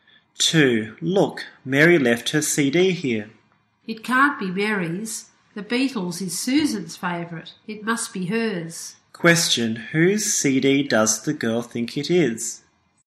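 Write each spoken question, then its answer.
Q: Question, whose CD does the girl think it is?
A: Susan's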